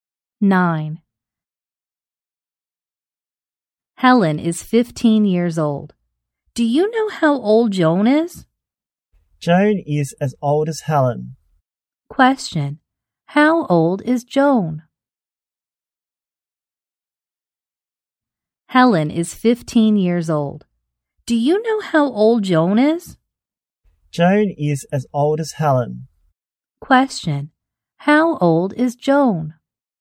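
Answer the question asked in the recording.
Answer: 15 years old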